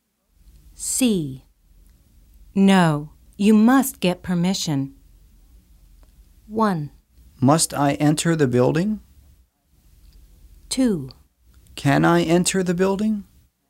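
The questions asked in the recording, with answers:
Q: No, you must get permission.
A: 2: Can I enter the building?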